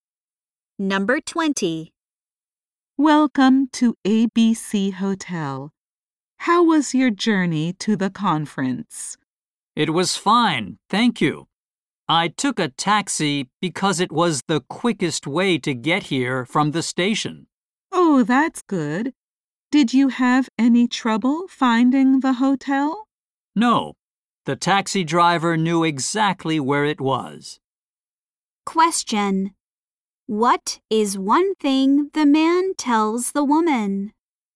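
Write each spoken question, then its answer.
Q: What is one thing the man tells the woman?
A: He took a taxi from the station.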